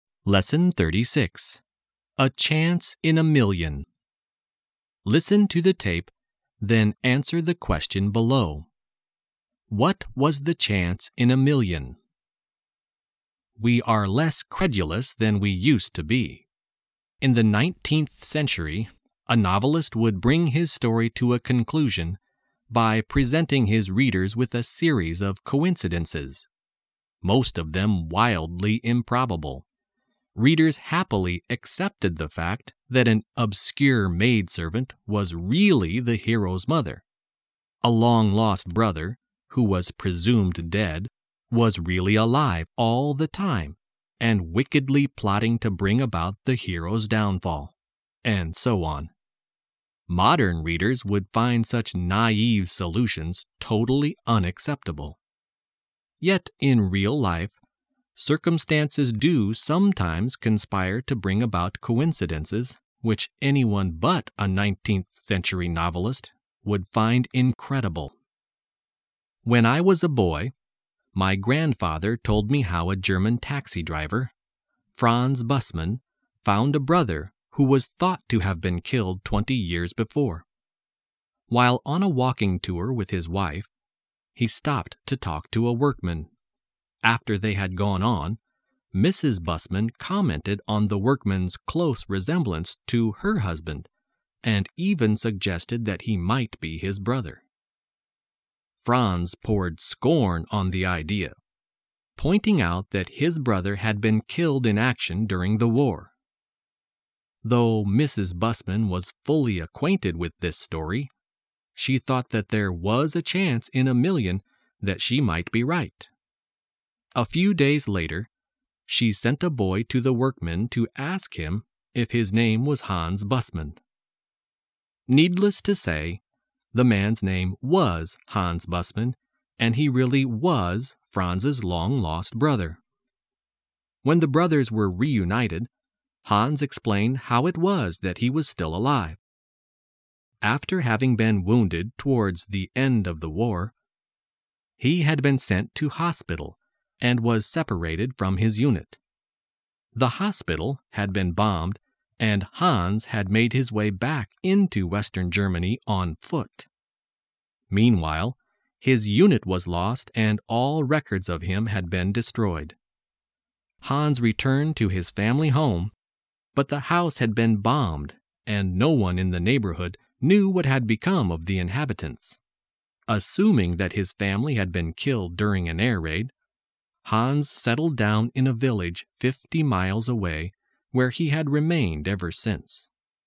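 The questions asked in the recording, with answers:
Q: What was the chance in a million?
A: That the workman who looked like Franz was really his long-lost brother Hans, who was thought to have been killed in the war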